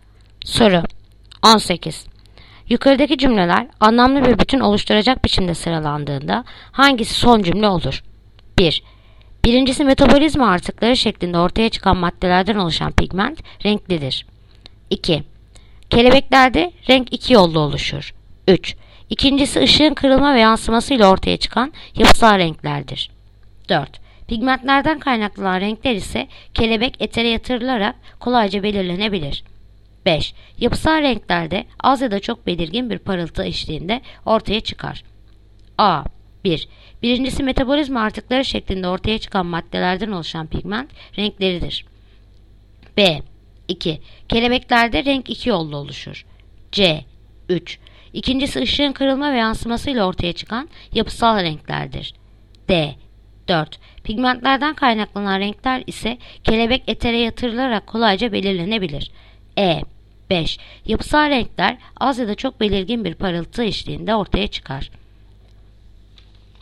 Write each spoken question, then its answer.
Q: Yukarıdaki cümleler anlamlı bir bütün oluşturacak biçimde sıralandığında hangisi son cümle olur?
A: Diyarbakır. 4. Pigmentlerden kaynaklanan renkler ise kelebek etere yatırılarak kolayca belirlenir.